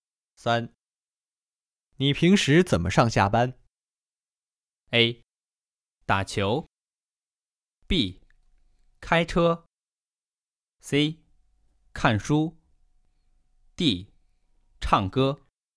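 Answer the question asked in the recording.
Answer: B: 开车。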